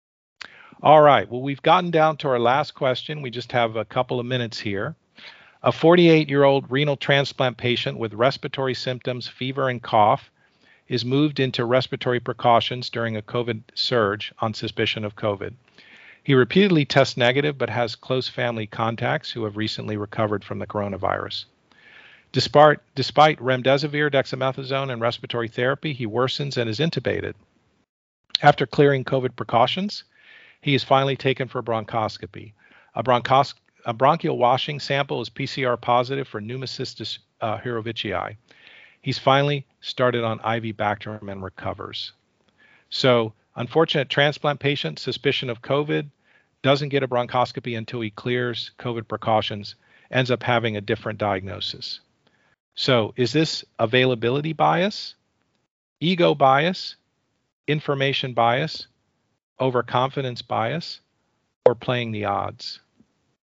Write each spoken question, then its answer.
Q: So, is this availability bias, ego bias, information bias, overconfidence bias, or playing the odds?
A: This turns out to be availability bias.